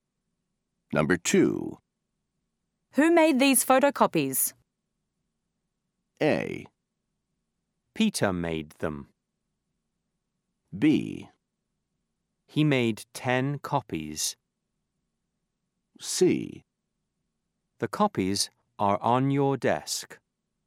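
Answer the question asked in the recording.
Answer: A: Peter made them.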